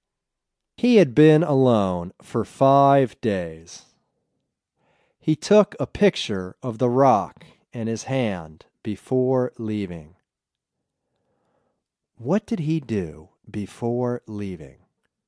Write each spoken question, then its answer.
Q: What did he do before leaving?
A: He took a picture of the rock in his hand before leaving.